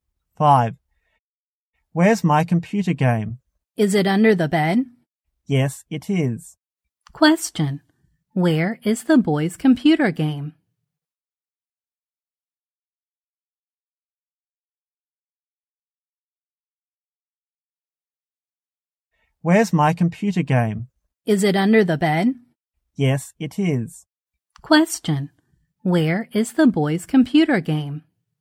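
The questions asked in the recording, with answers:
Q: Where is the boy's computer game?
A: Under the bed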